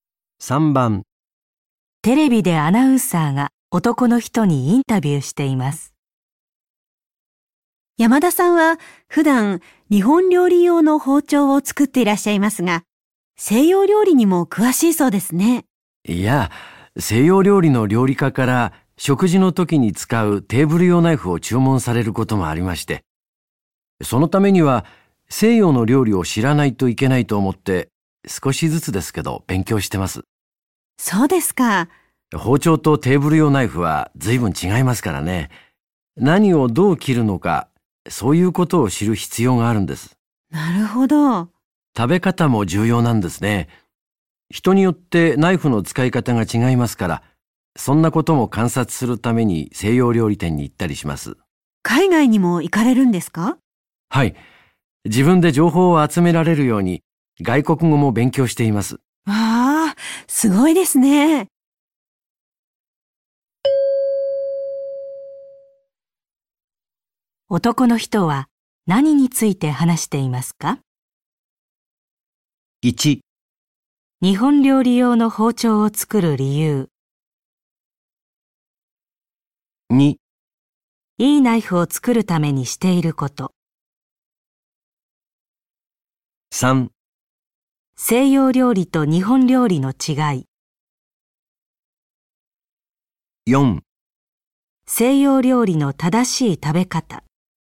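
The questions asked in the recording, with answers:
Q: 男の人は何について話していますか?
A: 2: いいナイフを作るためにしていること。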